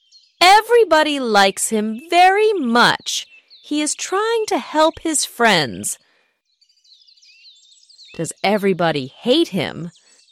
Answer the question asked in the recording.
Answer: No, everybody likes him very much.